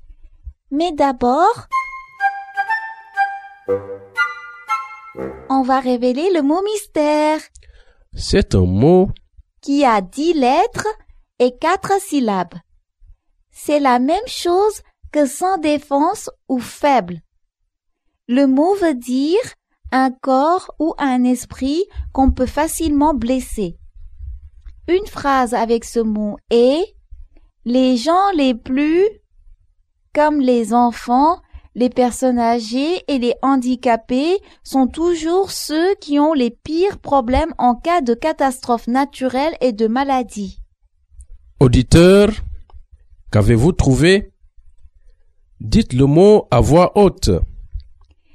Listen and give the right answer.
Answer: Le mot mystère est vulnérable.